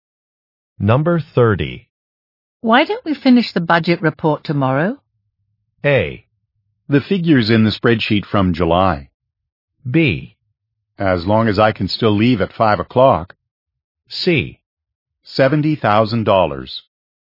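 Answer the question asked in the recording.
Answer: B: As long as I can still leave at 5 o'clock.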